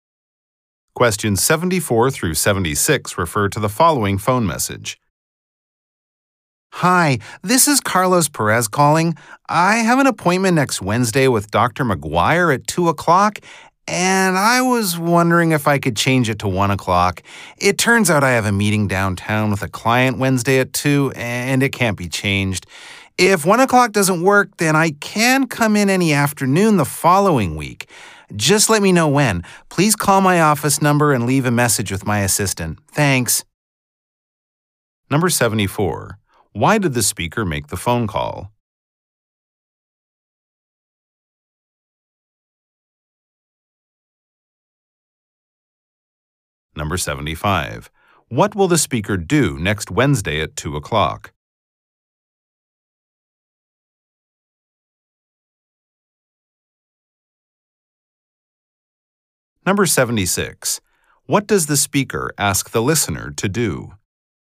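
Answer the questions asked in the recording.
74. To change an appointment time
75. Meet a client downtown
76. Call his office and leave a message with his assistant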